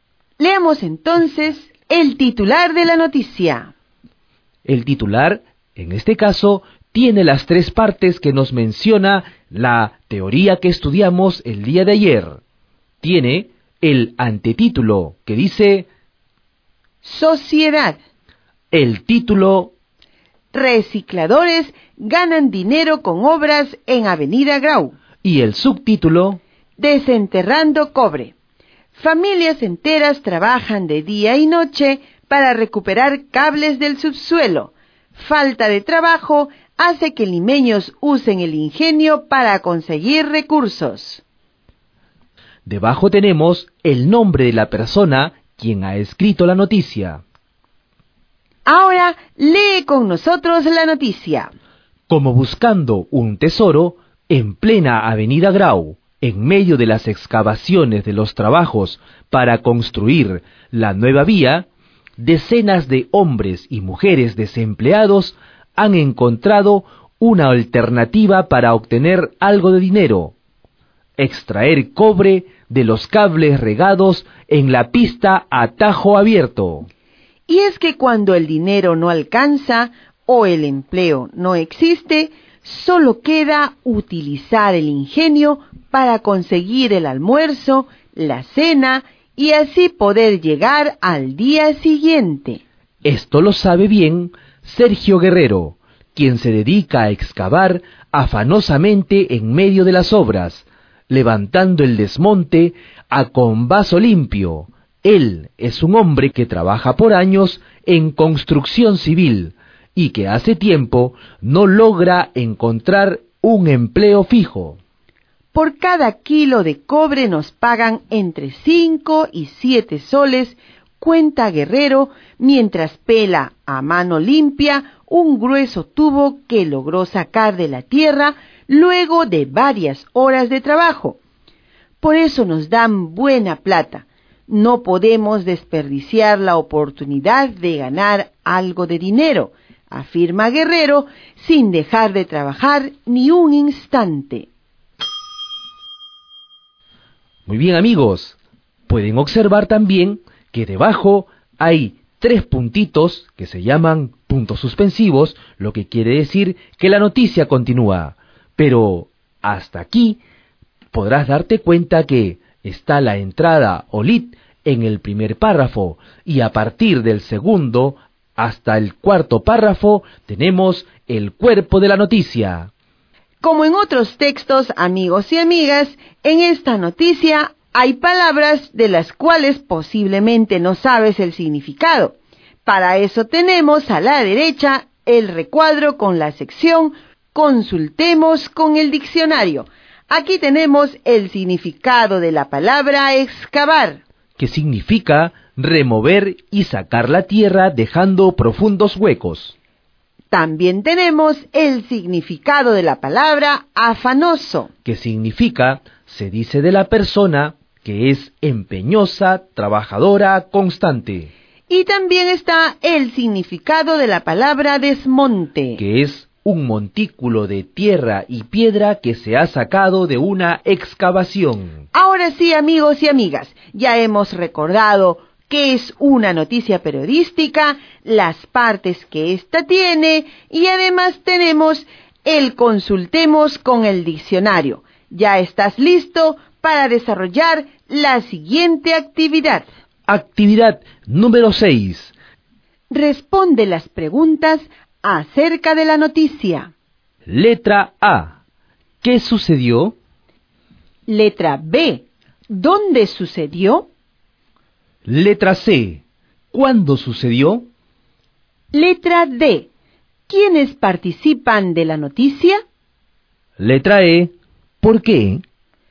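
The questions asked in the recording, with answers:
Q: ¿Qué sucedió?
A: Recicladores desempleados extraen cobre de los cables enterrados en las obras para ganar dinero

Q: ¿Dónde sucedió?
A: En la Avenida Grau (Lima)

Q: ¿Quiénes participan de la noticia?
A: Hombres y mujeres desempleados (familias enteras), como Sergio Guerrero

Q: ¿Por qué?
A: Por la falta de trabajo; necesitan dinero y les pagan entre 5 y 7 soles por kilo de cobre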